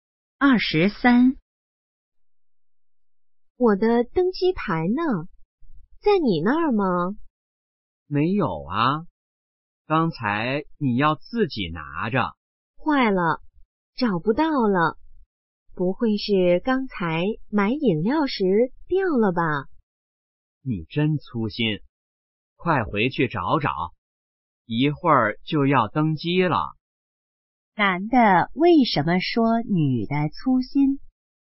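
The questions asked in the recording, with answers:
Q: 男的为什么说女的粗心?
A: 女的把登机牌弄丢了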